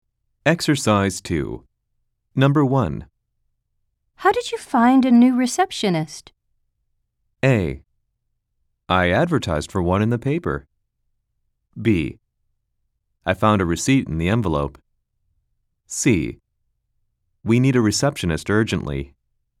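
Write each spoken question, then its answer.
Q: How did you find a new receptionist?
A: A: I advertised for one in the paper.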